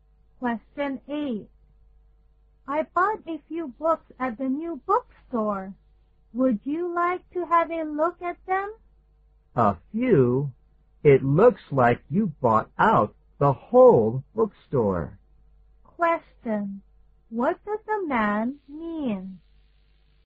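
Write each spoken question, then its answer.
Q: What does the man mean?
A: The woman bought a lot of books, not just a few.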